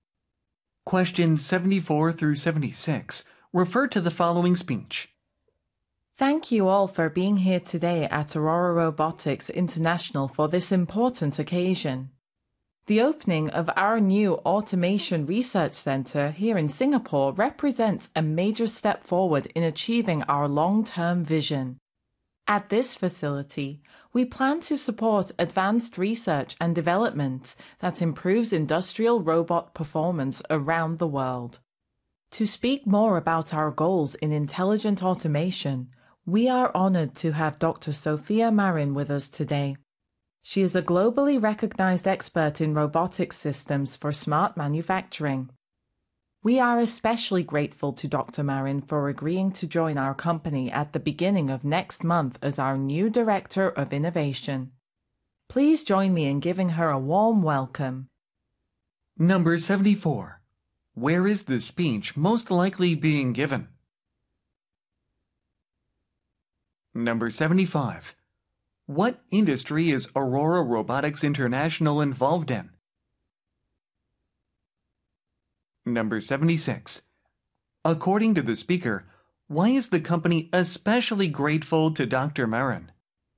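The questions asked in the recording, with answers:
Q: Where is the speech most likely being given?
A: At the opening of a new research center (Automation Research Center in Singapore)

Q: What industry is Aurora Robotics International involved in?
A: Robotics / industrial automation

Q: According to the speaker, why is the company especially grateful to Dr.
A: She agreed to join the company next month as Director of Innovation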